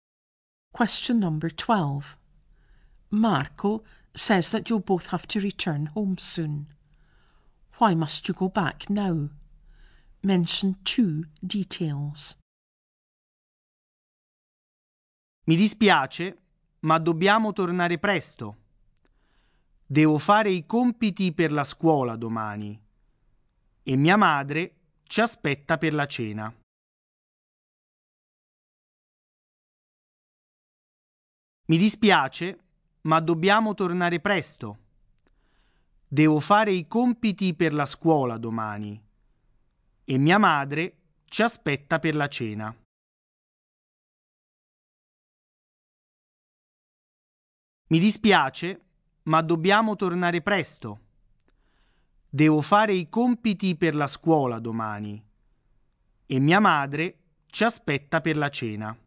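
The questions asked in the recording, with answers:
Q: Why must you go back now?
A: Marco has homework for school tomorrow and his mother is waiting for them for dinner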